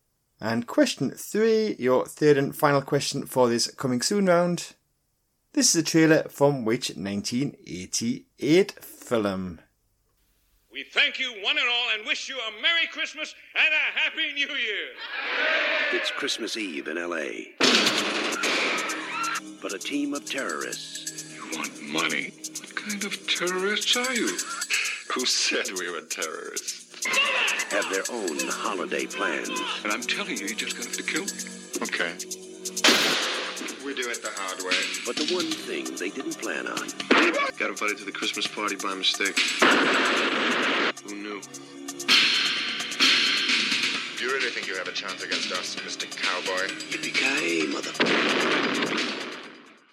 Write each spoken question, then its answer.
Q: This is a trailer from which 1988 film?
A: And that film was Die Hard.